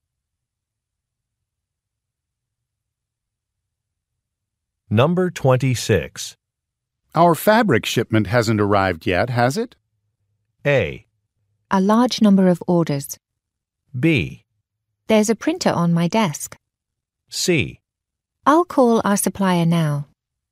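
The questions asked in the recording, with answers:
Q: Our fabric shipment hasn't arrived yet, has it?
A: C: I'll call our supplier now.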